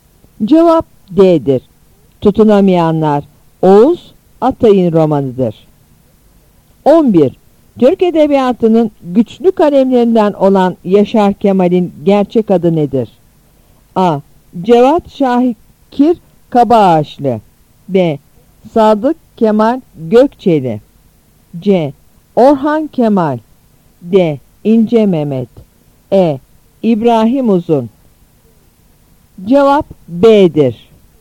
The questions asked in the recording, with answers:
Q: Türk Edebiyatı'nın güçlü kalemlerinden olan Yaşar Kemal'in gerçek adı nedir?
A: Cevap B'dir.